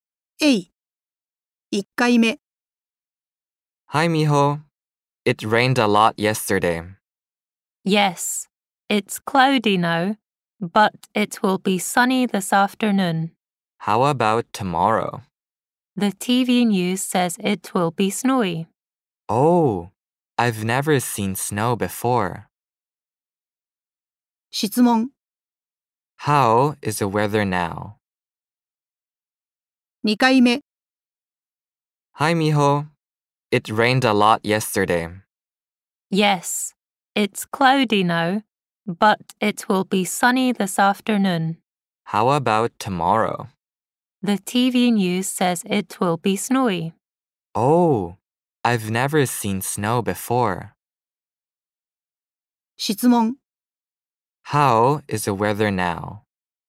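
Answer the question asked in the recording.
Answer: It's cloudy.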